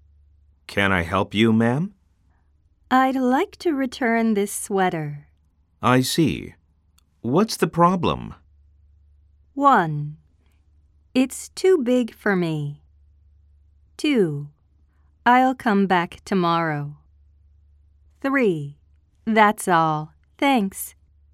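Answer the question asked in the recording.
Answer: 1: It's too big for me.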